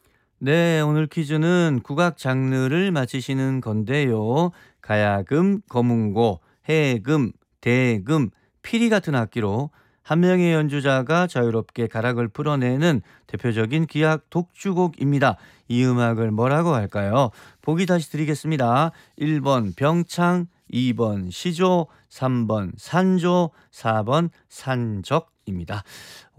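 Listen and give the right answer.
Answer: 3: 산조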